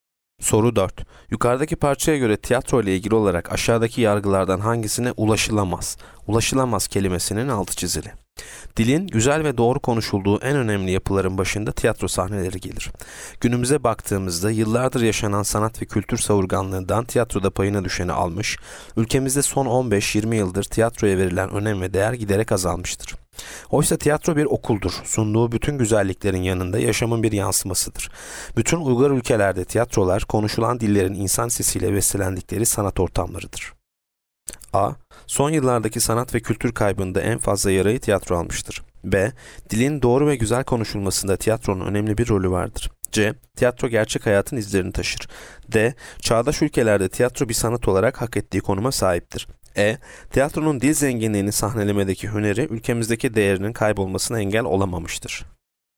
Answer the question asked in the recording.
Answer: Yanıt A. Son yıllardaki sanat ve kültür kaybında en fazla yarayı tiyatro almıştır.